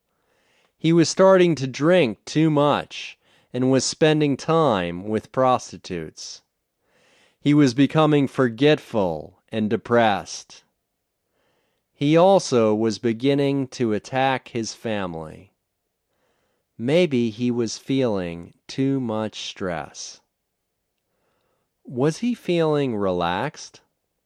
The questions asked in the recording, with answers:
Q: Was he feeling relaxed?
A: No, he wasn't feeling relaxed.